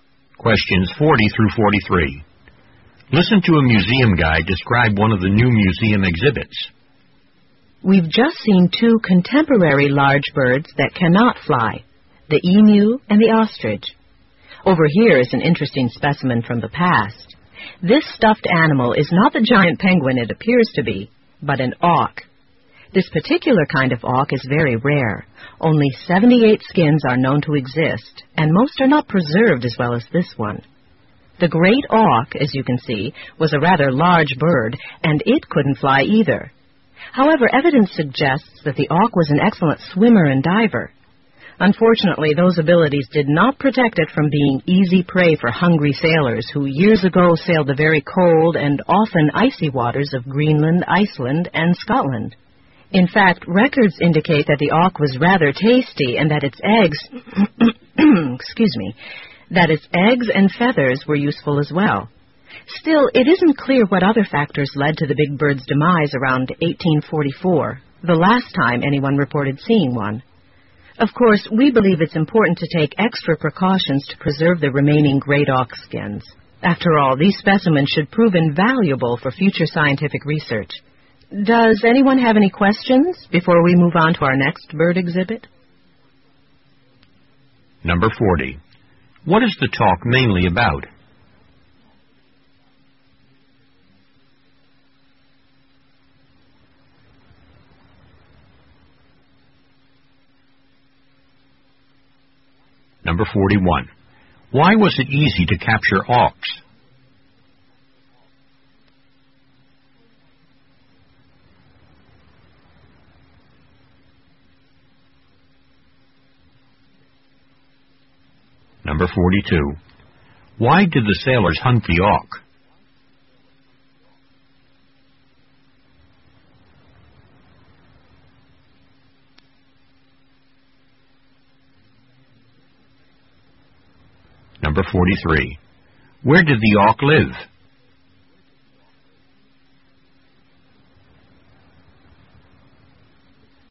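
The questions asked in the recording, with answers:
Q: What is the talk mainly about?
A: The great auk, a rare extinct flightless bird

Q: Why did the sailors hunt the auk?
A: For food (it was tasty), and for its eggs and feathers

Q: Where did the auk live?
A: In the cold waters around Greenland, Iceland and Scotland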